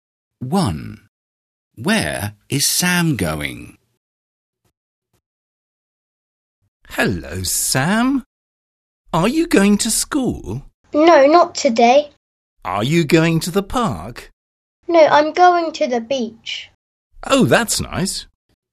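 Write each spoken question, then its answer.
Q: Where is Sam going?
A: To the beach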